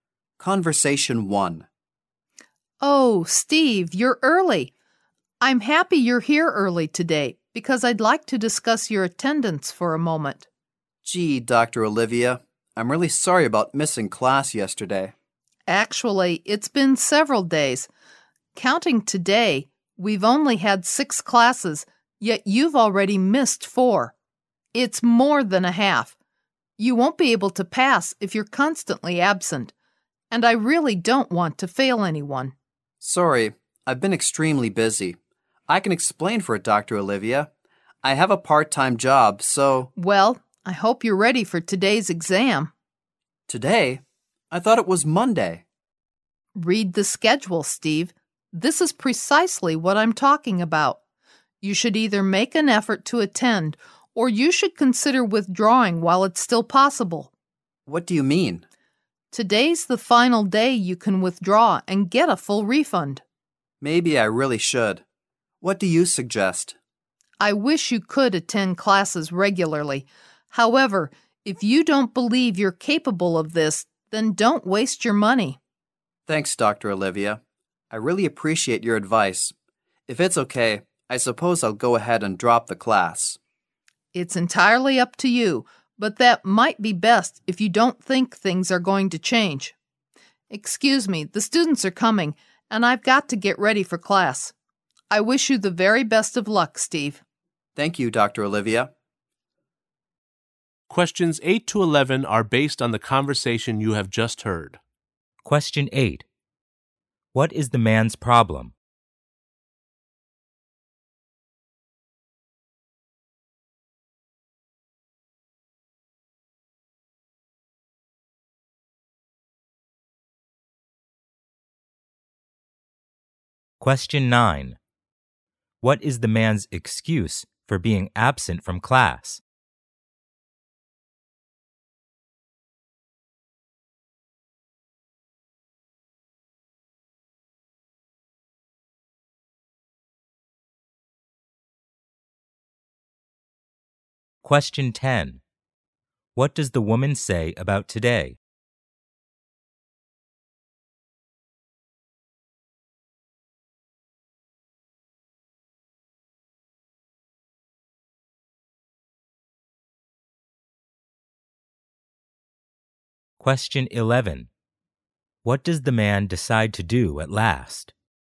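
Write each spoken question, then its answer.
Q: What is the man's problem?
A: He has missed too many classes (4 of 6).

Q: What is the man's excuse for being absent from class?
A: He has a part-time job.

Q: What does the man decide to do at last?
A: Drop the class.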